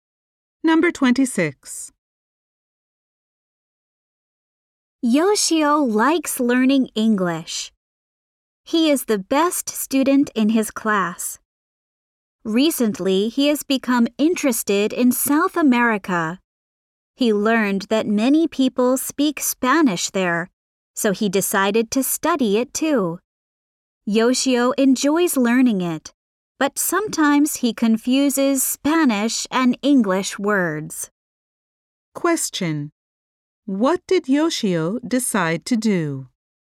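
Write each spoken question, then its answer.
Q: Question: What did Yoshio decide to do?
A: Study Spanish.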